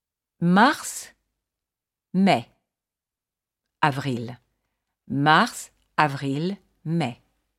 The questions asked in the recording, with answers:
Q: Mars, mai,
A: avril.